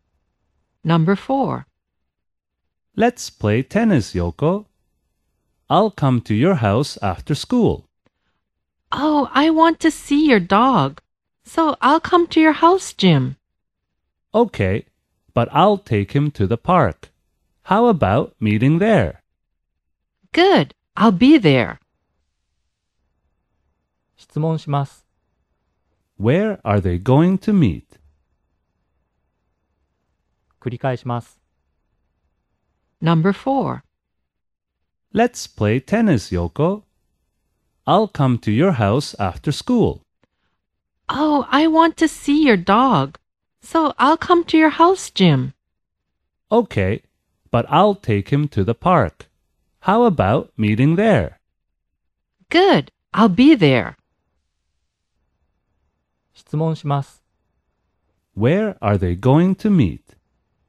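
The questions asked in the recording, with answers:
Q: Where are they going to meet?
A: At the park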